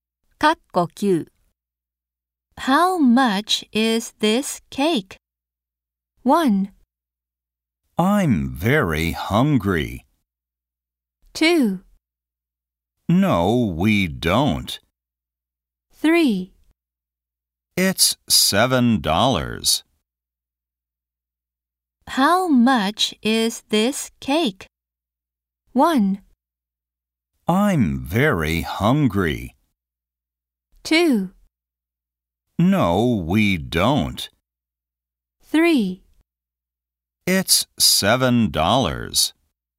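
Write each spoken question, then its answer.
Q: How much is this cake?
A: 3: It's $7.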